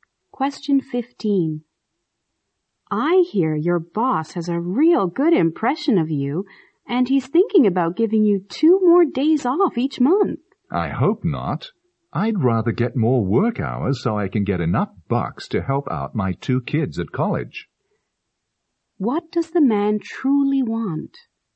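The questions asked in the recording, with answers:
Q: What does the man truly want?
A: More work hours to earn more money for his kids at college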